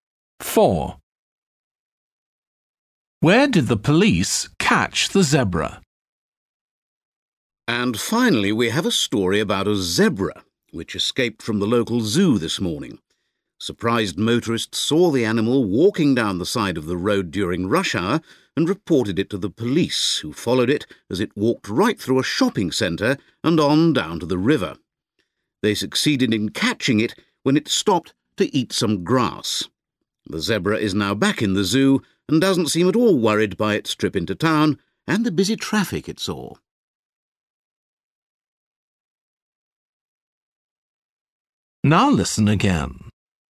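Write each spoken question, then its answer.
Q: Where did the police catch the zebra?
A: by the river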